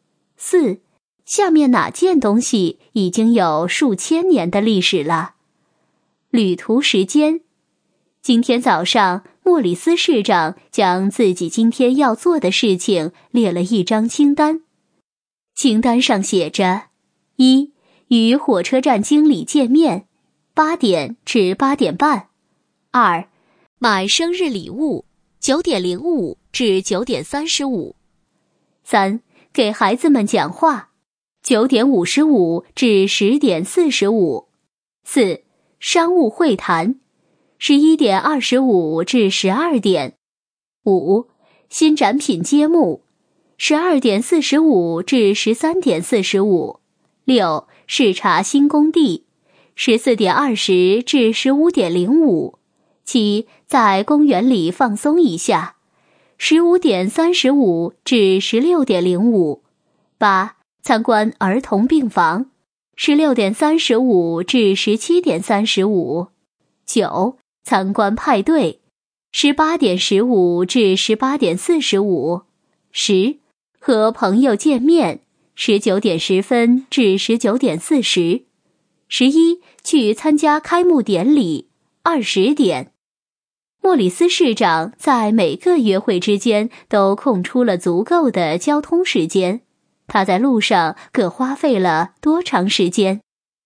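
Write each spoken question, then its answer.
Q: 莫里斯市长在每个约会之间都空出了足够的交通时间,他在路上各花费了多长时间?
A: 依次为35分钟、20分钟、40分钟、45分钟、35分钟、30分钟、30分钟、40分钟、25分钟、20分钟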